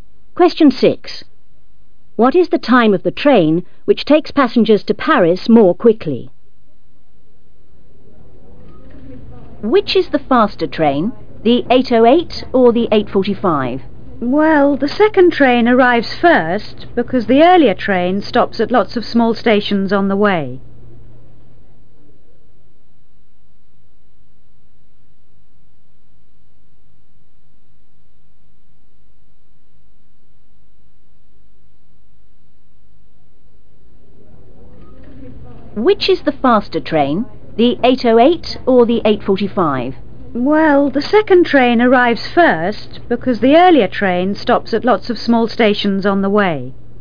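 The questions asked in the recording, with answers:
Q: What is the time of the train which takes passengers to Paris more quickly?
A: 8:45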